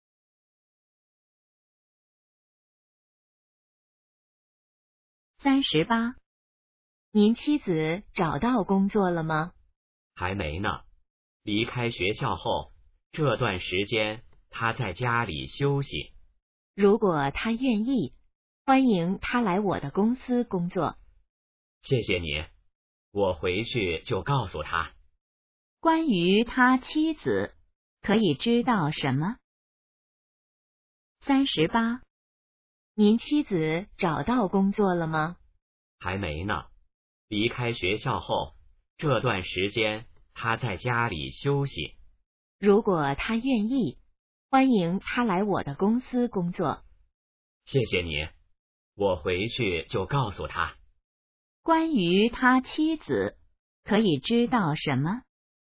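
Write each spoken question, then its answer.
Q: 关于他妻子,可以知道什么?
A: 还没找到工作,在家休息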